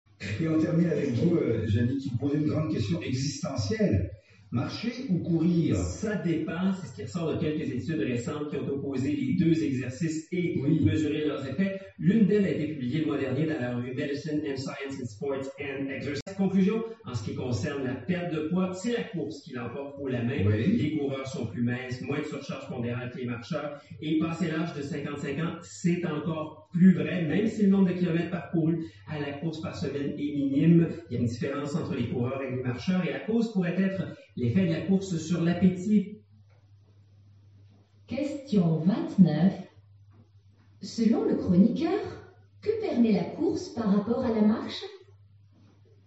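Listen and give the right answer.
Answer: Elle permet de perdre davantage de poids.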